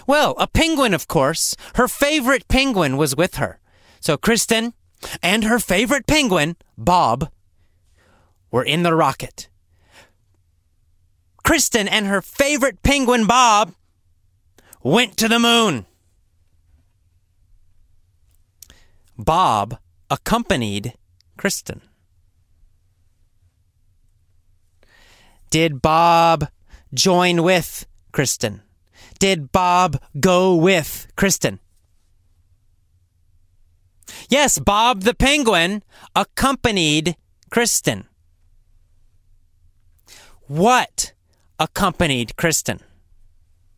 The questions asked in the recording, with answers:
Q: What accompanied Kristen?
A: A penguin. A penguin accompanied Kristen.